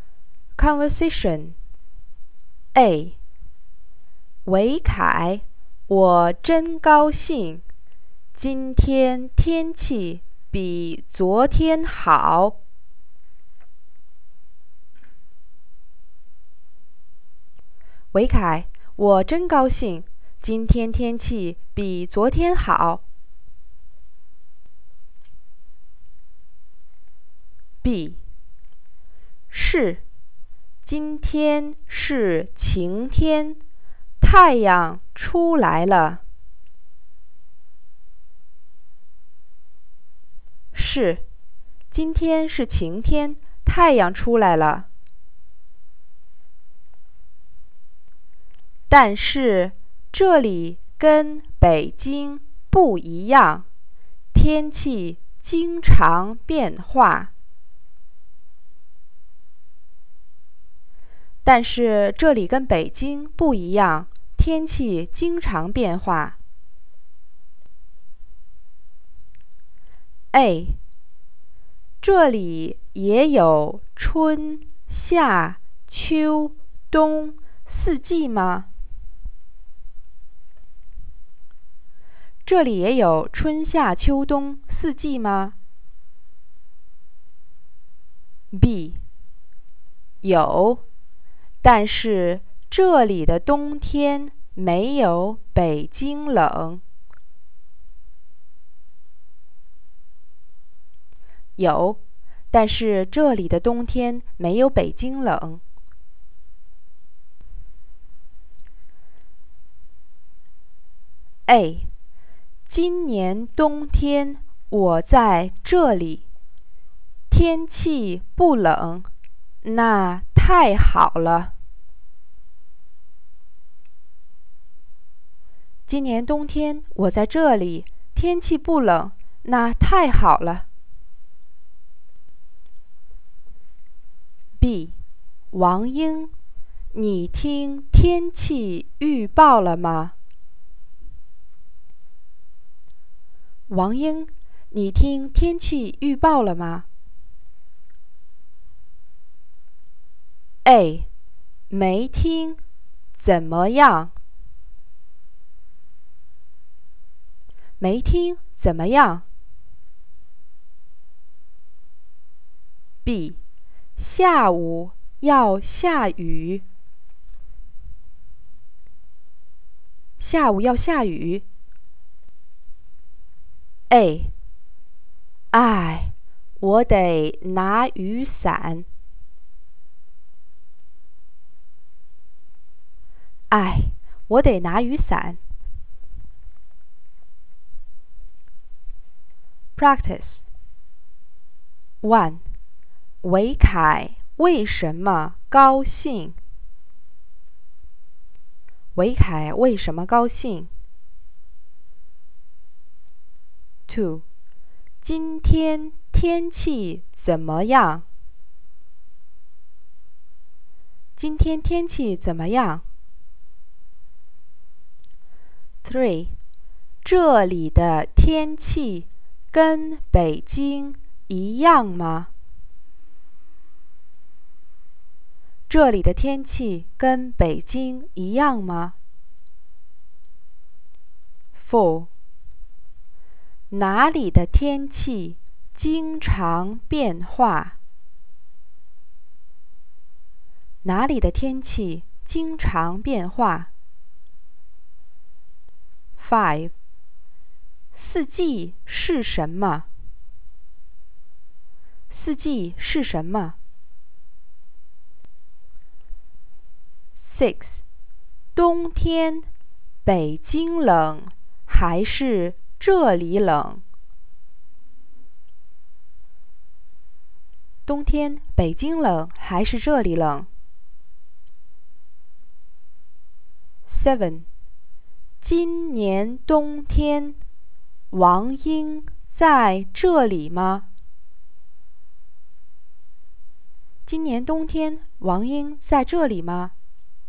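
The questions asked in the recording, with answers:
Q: 今天天气怎么样?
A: 今天是晴天,太阳出来了,比昨天好。

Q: 这里的天气跟北京一样吗?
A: 不一样。

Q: 哪里的天气经常变化?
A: 这里的天气经常变化。

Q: 四季是什么?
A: 春、夏、秋、冬。

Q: 冬天北京冷还是这里冷?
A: 北京冷。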